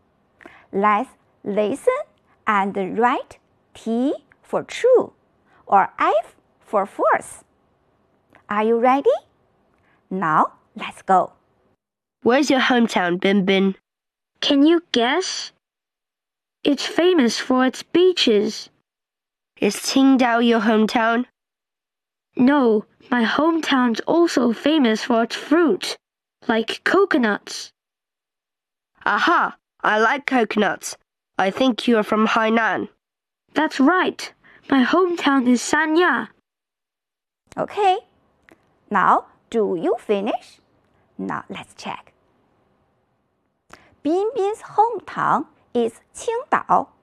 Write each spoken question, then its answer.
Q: Binbin's hometown is Qingdao.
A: We know Binbin's hometown is Qingdao is false.